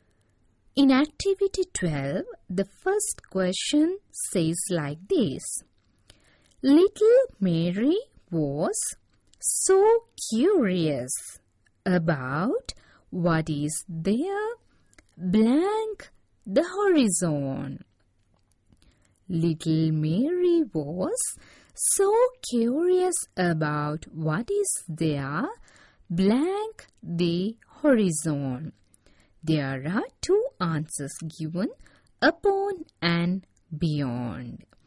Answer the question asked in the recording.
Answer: Beyond, Little Mary was so curious about what is there beyond the horizon.